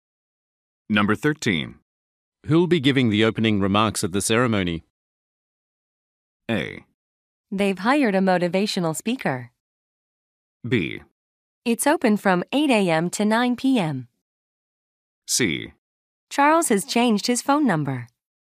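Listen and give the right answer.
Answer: A: They've hired a motivational speaker.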